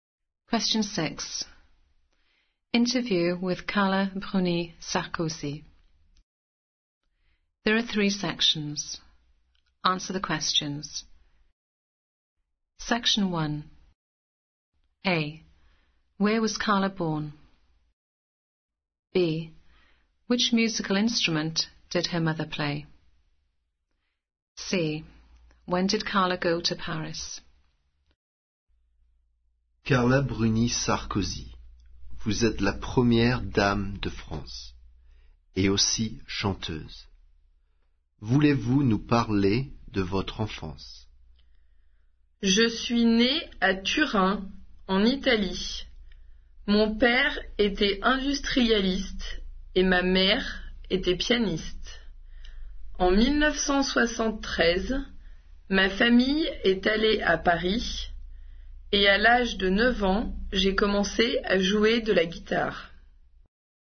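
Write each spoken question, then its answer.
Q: Where was Carla born?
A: Turin, Italy

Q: Which musical instrument did her mother play?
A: Piano

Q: When did Carla go to Paris?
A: 1973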